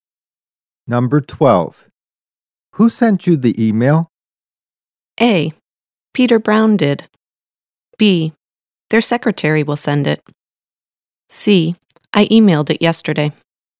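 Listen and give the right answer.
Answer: A: Peter Brown did.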